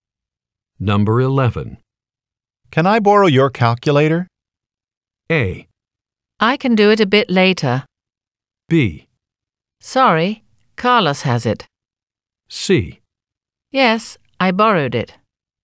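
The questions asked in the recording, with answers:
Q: Can I borrow your calculator?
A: B: Sorry, Carlos has it.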